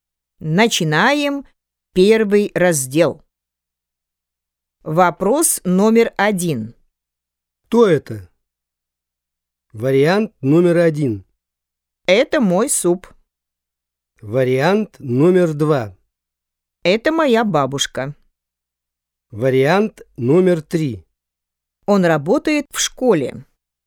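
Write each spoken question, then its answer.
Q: Кто это?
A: 2: Это моя бабушка.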